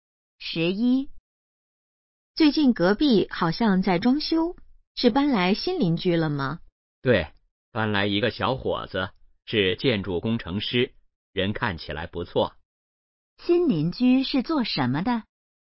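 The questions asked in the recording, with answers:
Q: 新邻居是做什么的?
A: 建筑工程师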